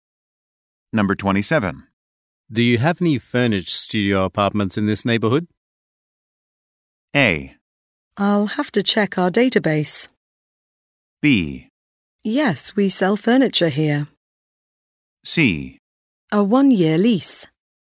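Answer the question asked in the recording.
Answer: A: I'll have to check our database.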